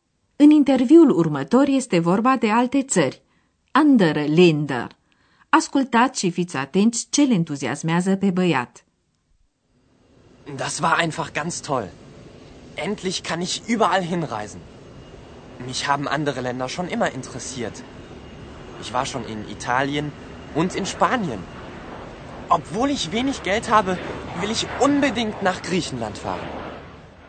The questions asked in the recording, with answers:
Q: Ascultați și fiți atenți ce le entuziasmează pe băiat.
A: Băiatul e entuziasmat pentru că în fine poate călători pretutindeni.